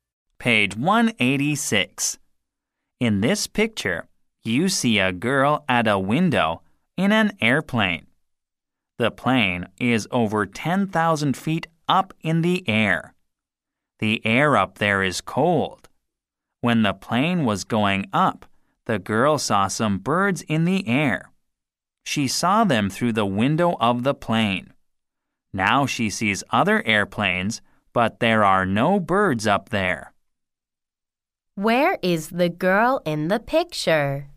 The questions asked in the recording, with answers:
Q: Where is the girl in the picture?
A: The girl in the picture is at a window in an airplane.